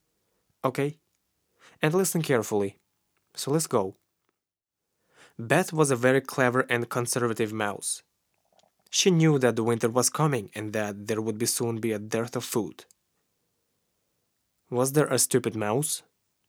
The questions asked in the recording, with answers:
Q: Was there a stupid mouse?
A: No, there was not a stupid mouse.